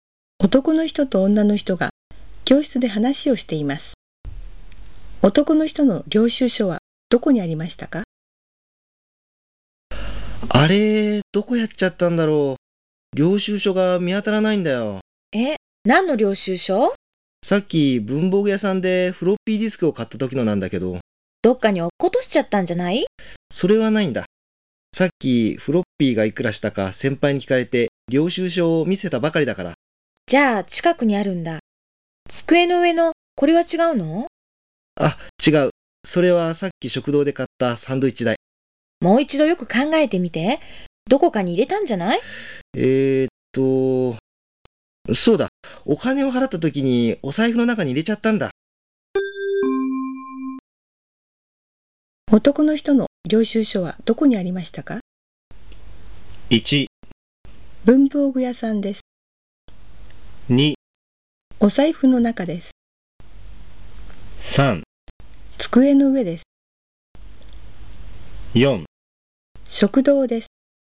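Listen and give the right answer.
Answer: 2: お財布の中です。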